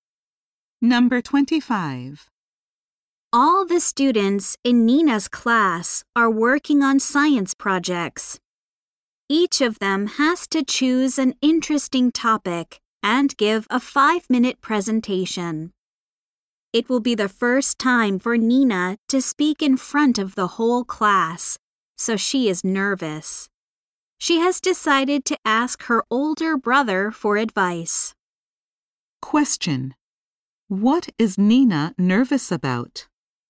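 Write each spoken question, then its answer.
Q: What is Nina nervous about?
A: Speaking in front of the whole class for the first time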